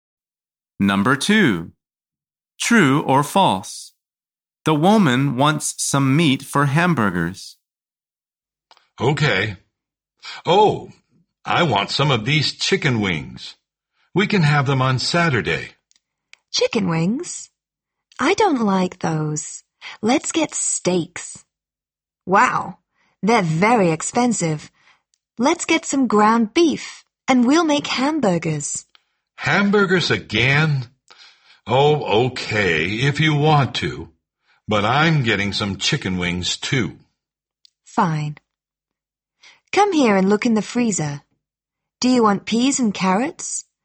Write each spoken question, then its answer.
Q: True or false? The woman wants some meat for hamburgers.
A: The answer is true.